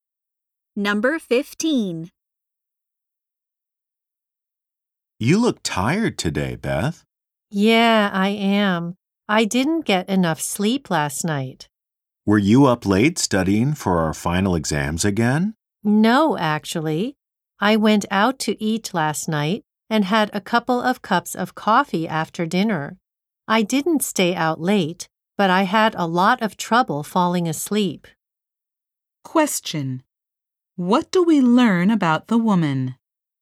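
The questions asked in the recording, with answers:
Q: What do we learn about the woman?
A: She couldn't sleep well after drinking coffee.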